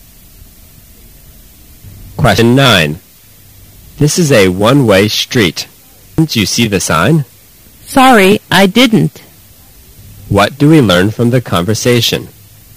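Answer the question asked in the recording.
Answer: The driver went the wrong way down a one-way street without seeing the sign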